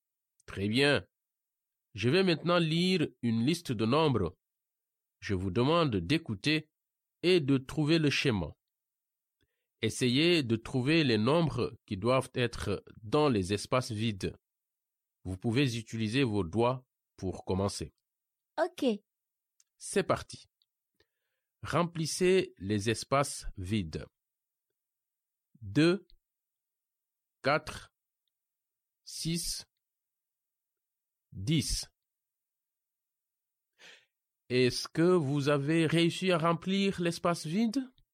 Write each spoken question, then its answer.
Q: Est-ce que vous avez réussi à remplir l'espace vide?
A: Le premier espace vide est 8.